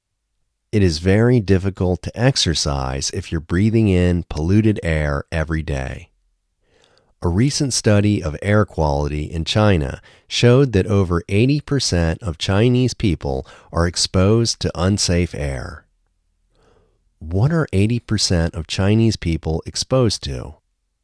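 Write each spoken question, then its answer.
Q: What are 80% of Chinese people exposed to?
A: Unsafe air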